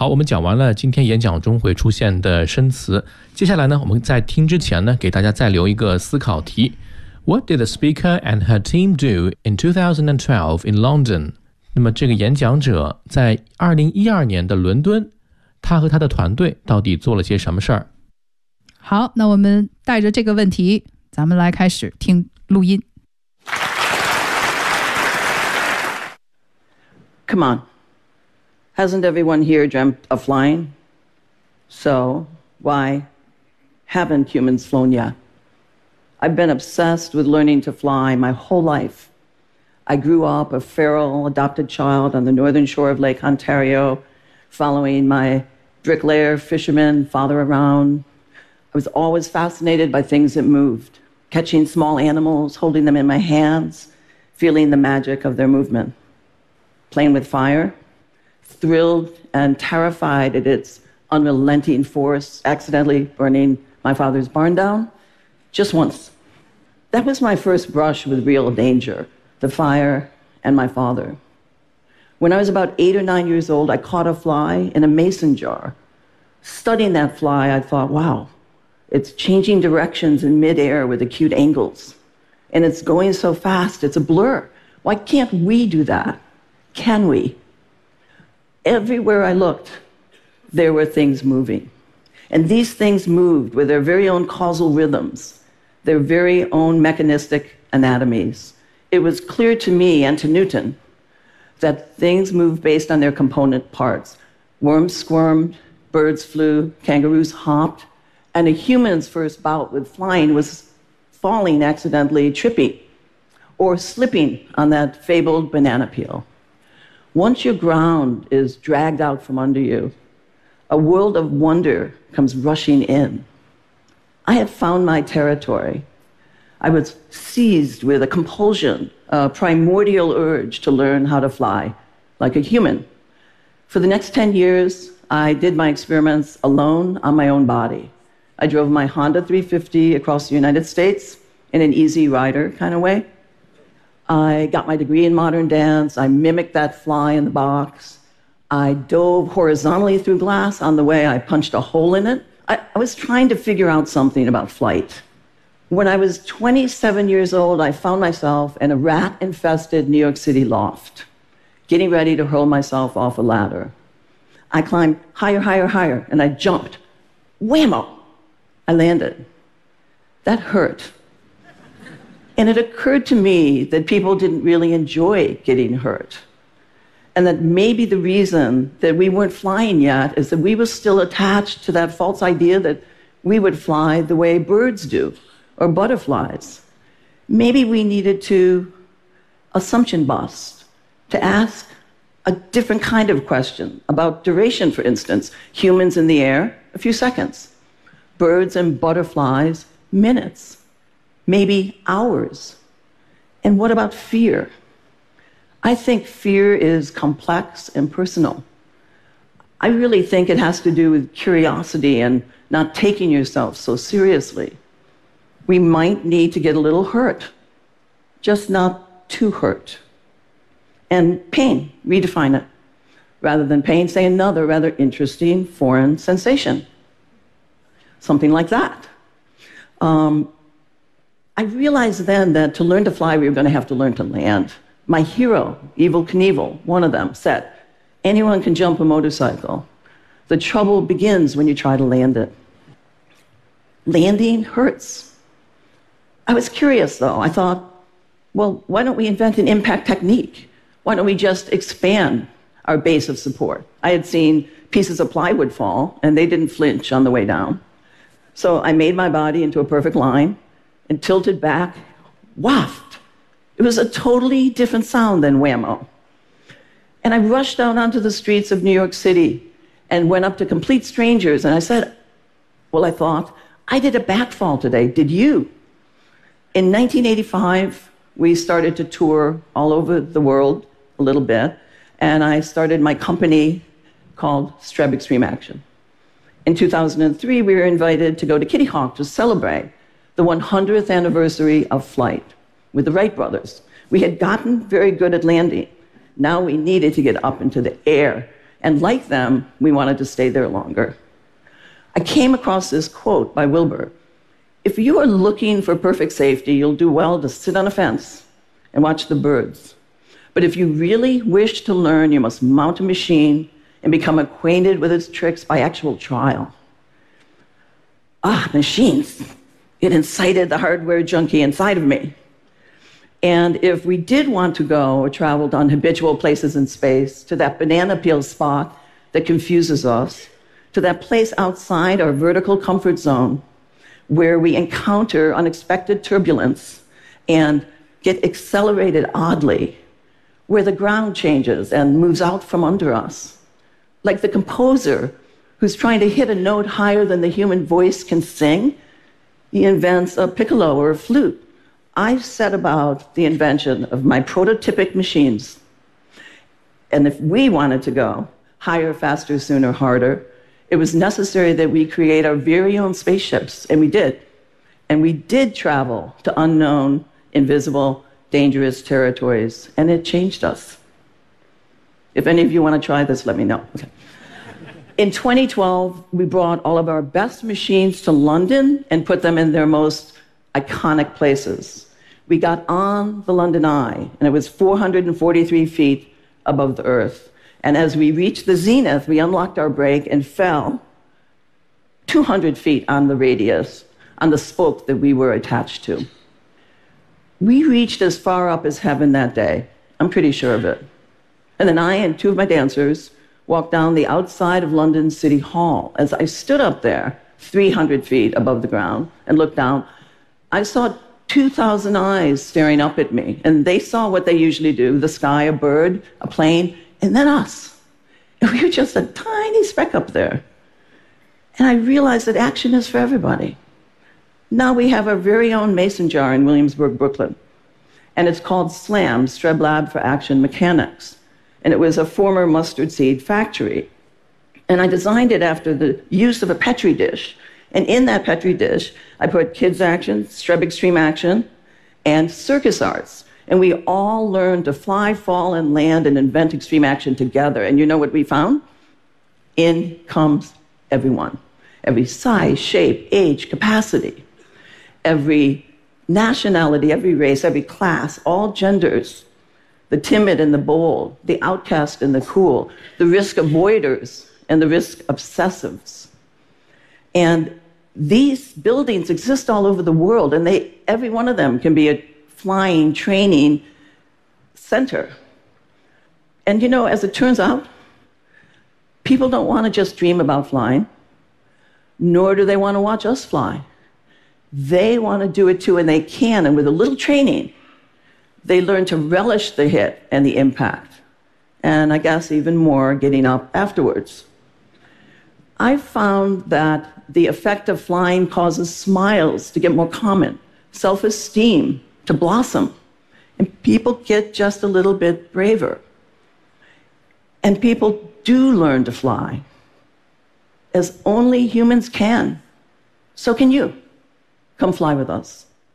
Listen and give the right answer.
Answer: In 2012, we brought all of our best machines to London and put them in their most iconic places.